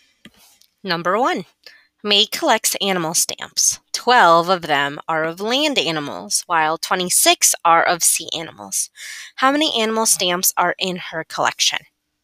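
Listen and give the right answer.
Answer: 38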